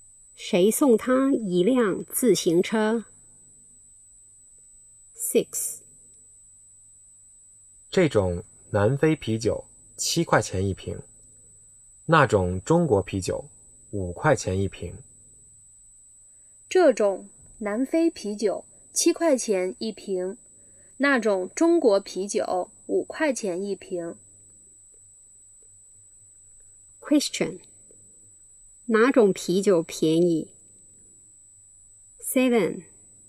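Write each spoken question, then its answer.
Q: 哪种啤酒便宜?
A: 中国啤酒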